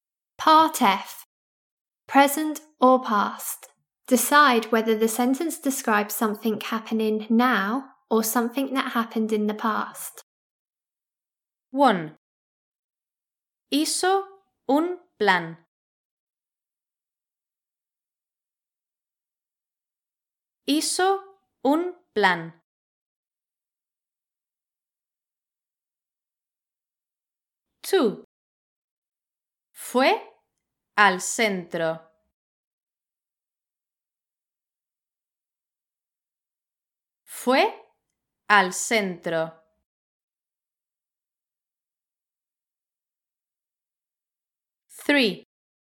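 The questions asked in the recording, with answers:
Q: Hizo un plan.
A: something that happened in the past

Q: Fue al centro.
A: something that happened in the past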